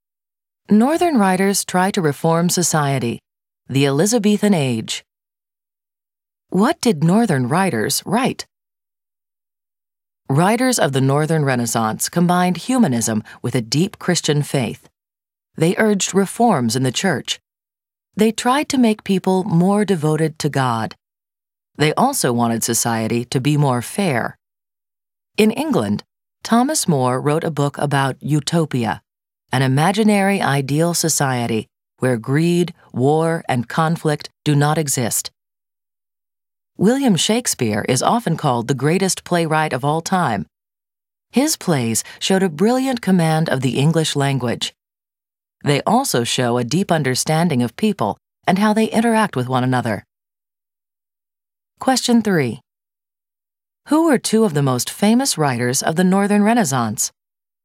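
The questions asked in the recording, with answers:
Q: Who were two of the most famous writers of the Northern Renaissance?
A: Thomas More and William Shakespeare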